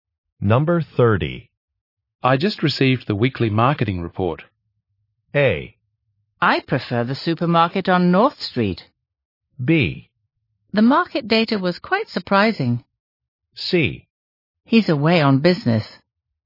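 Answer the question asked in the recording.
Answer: B: The market data was quite surprising.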